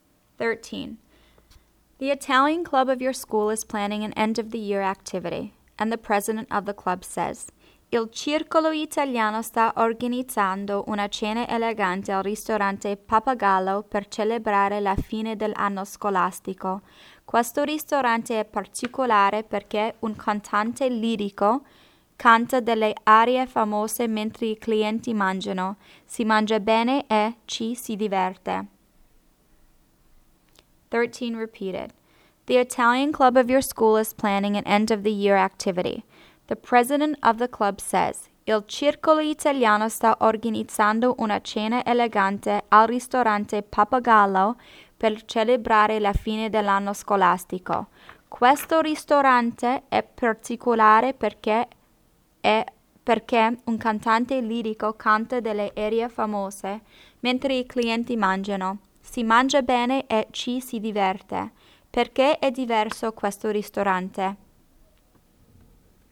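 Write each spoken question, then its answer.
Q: Perché è diverso questo ristorante?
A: Un cantante lirico canta arie famose mentre i clienti mangiano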